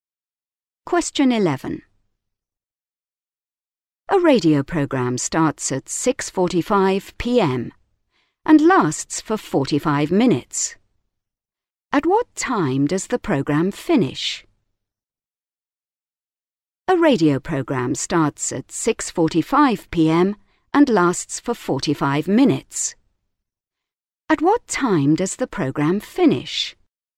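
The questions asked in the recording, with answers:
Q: At what time does the program finish?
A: 7:30 p.m.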